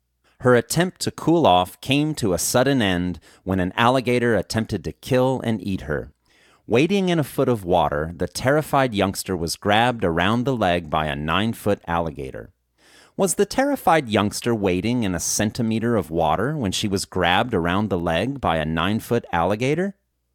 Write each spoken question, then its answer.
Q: Was the terrified youngster wading in a centimeter of water when she was grabbed around the leg by a 9-foot alligator?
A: No, the terrified youngster wasn't wading in a centimeter of water when she was grabbed around the leg by a 9-foot alligator.